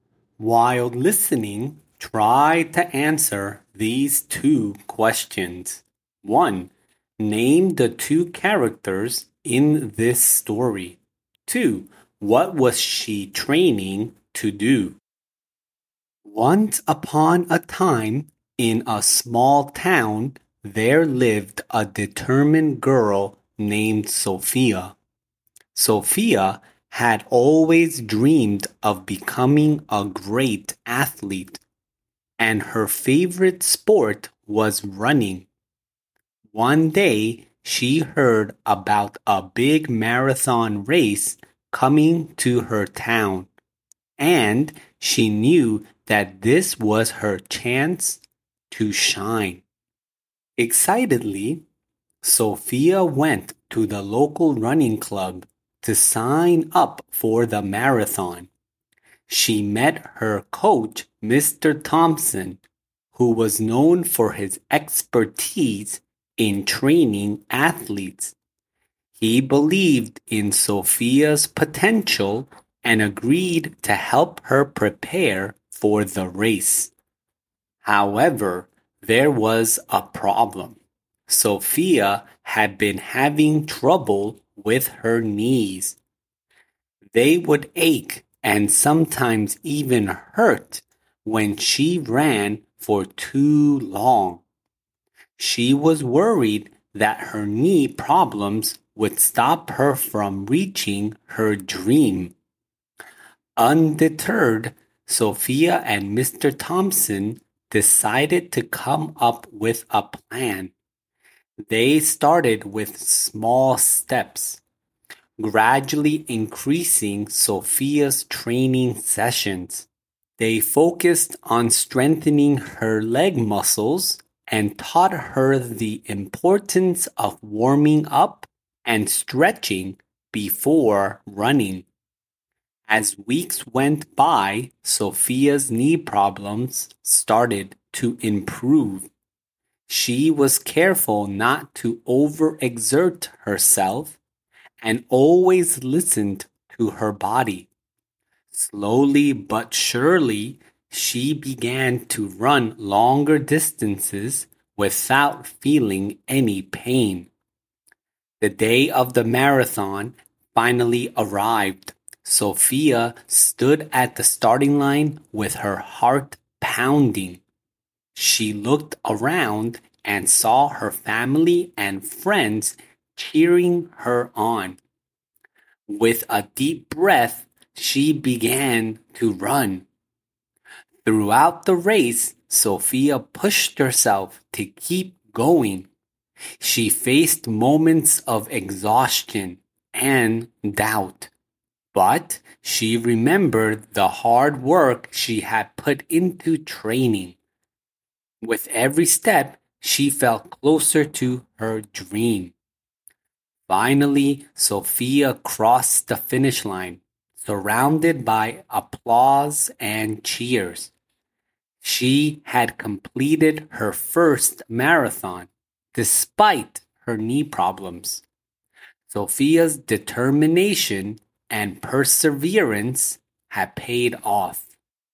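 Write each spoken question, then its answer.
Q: name the two characters in this story.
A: Sofia and Mr. Thompson

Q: what was she training to do?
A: To run a marathon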